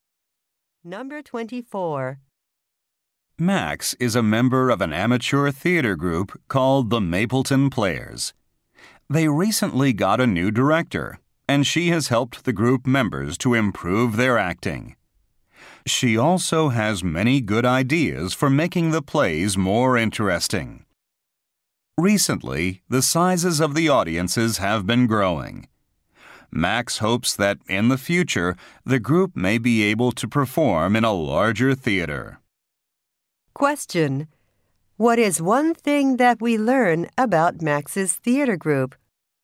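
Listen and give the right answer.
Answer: Its audiences have been growing.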